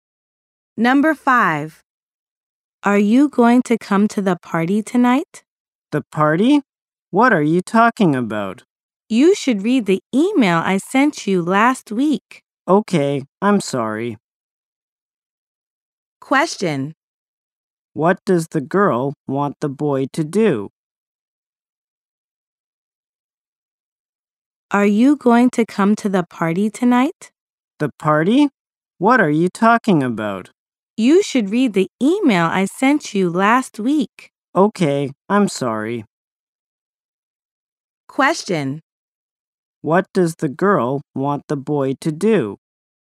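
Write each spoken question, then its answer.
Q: What does the girl want the boy to do?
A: Read the email she sent last week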